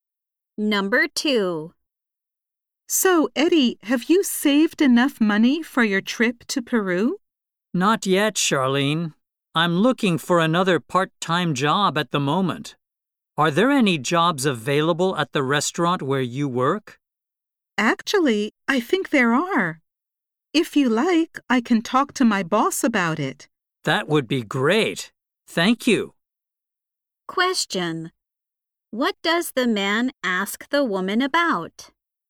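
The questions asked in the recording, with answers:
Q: What does the man ask the woman about?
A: Whether there are jobs available at her restaurant.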